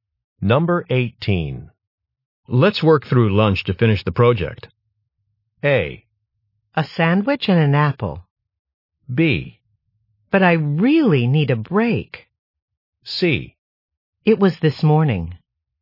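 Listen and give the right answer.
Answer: B: But I really need a break.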